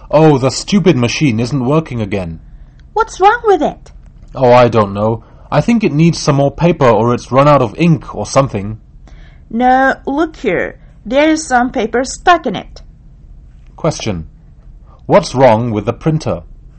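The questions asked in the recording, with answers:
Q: What's wrong with the printer?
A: There's paper stuck in it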